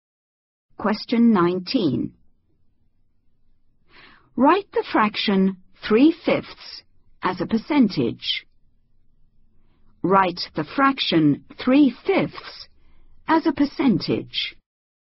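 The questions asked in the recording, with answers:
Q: Write the fraction 3/5 as a percentage.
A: 60%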